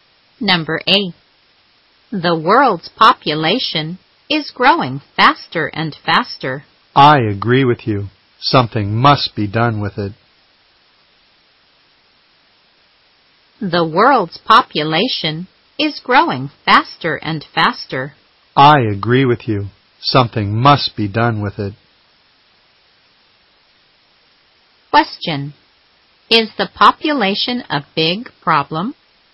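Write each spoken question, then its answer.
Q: Is the population a big problem?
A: Yes, it is growing faster and faster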